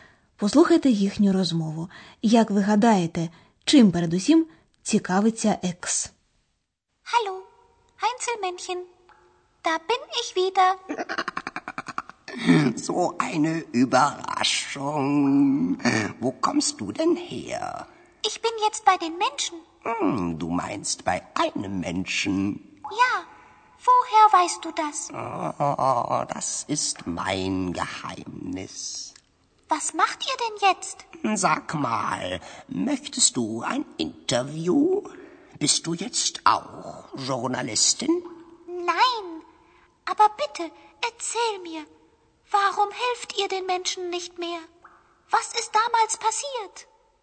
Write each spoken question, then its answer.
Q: Як ви гадаєте, чим передусім цікавиться екс?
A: Отже, найбільше цікавий текст Чому гноми більше не допомагають людям?